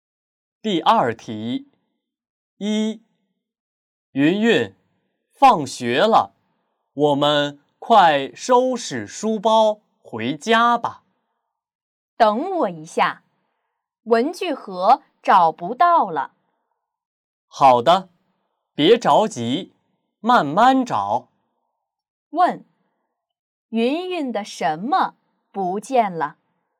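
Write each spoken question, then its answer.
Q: 问,云云的什么不见了?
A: 文具盒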